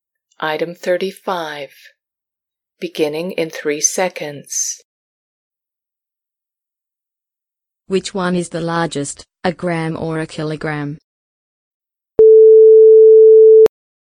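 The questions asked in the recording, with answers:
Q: Which one is the largest, a gram or a kilogram?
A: a kilogram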